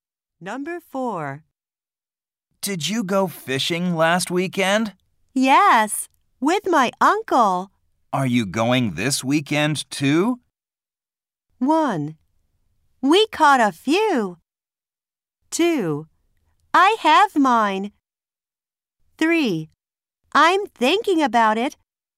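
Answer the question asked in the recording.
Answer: 3: I'm thinking about it.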